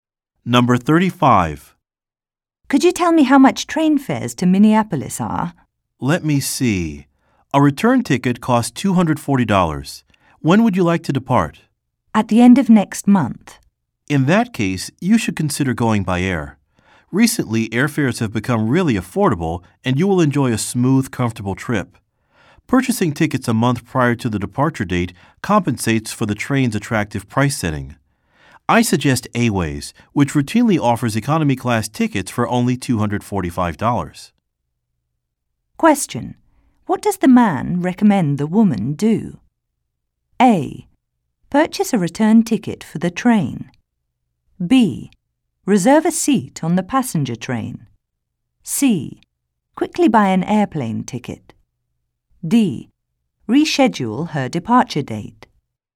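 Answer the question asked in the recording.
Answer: C: Quickly buy an airplane ticket.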